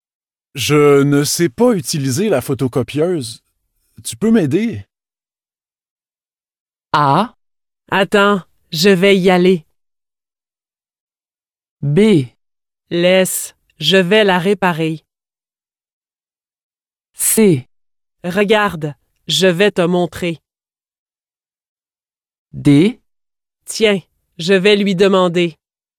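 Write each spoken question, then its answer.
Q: Tu peux m'aider?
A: C: Regarde, je vais te montrer.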